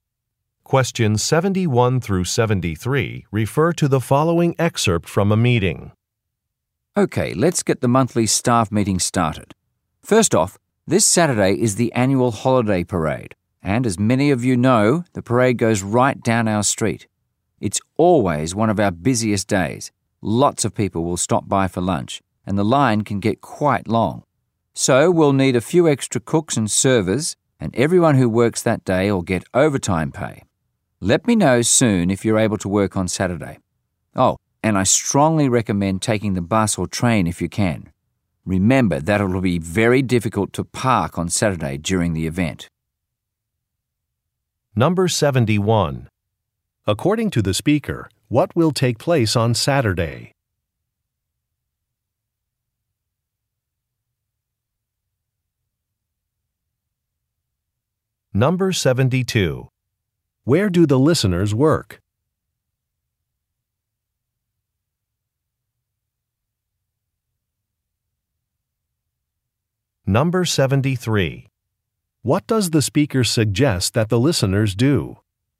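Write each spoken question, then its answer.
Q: According to the speaker, what will take place on Saturday?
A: A holiday parade

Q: Where do the listeners work?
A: At a restaurant

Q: What does the speaker suggest that the listeners do?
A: Take the bus or train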